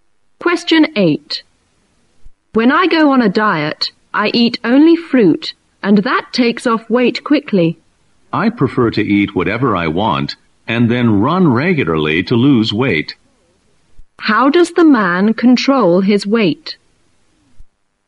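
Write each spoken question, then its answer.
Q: How does the man control his weight?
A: By running regularly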